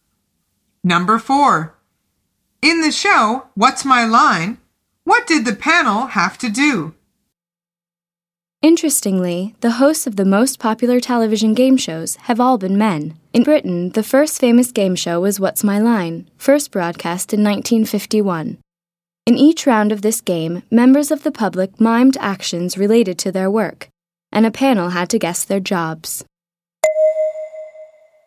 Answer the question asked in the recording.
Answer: The answer is guess the jobs that members of the public were miming.